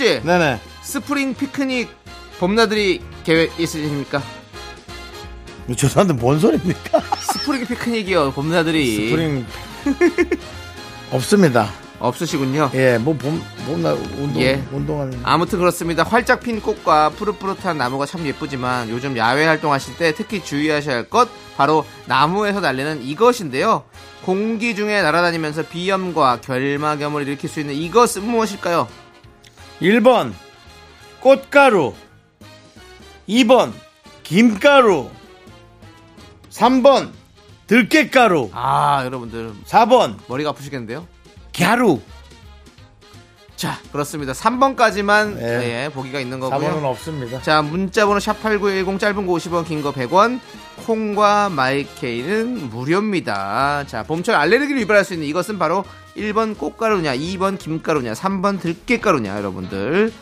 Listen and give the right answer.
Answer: 꽃가루입니다.